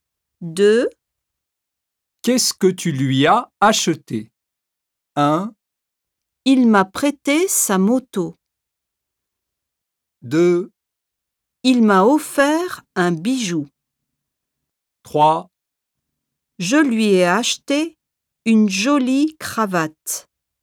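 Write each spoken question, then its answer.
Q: Qu'est-ce que tu lui as acheté ?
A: 3: Je lui ai acheté une jolie cravate.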